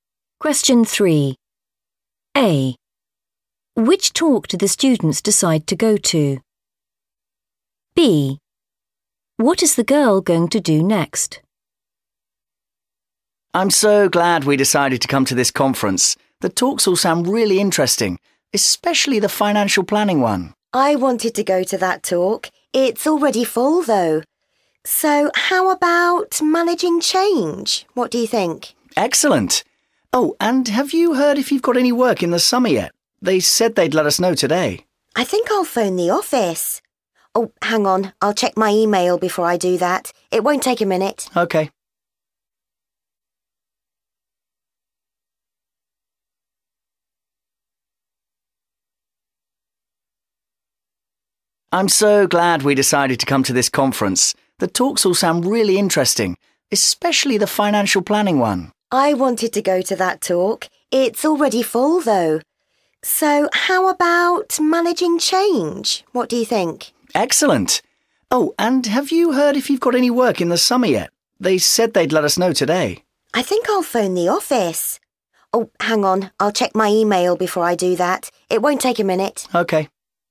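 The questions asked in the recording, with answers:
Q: Which talk do the students decide to go to?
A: managing change

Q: What is the girl going to do next?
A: check her email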